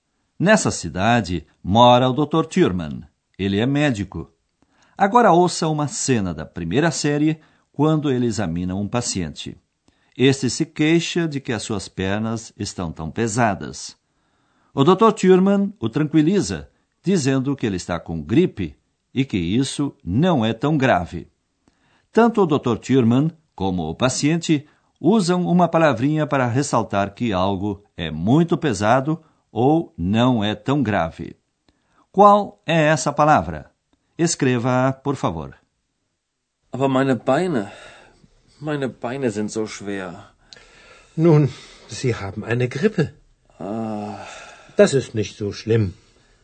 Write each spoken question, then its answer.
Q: Qual é essa palavra?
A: E a última era a palavrinha zo, tão.